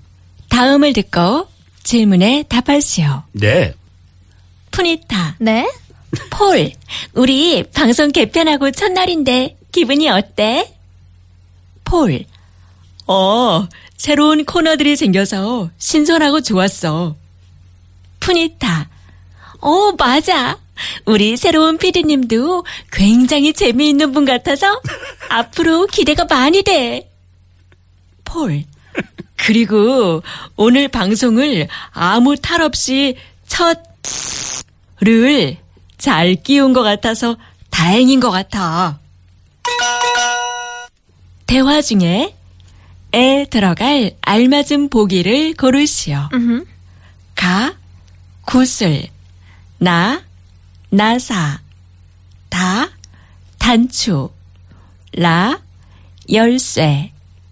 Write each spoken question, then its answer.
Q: 대화 중에 에 들어갈 알맞은 보기를 고르시오.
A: Ta, a danchu, a button.